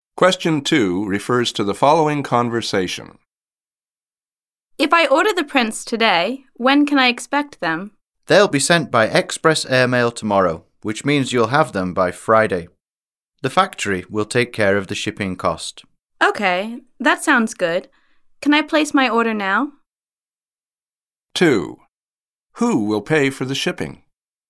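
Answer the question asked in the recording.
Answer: The factory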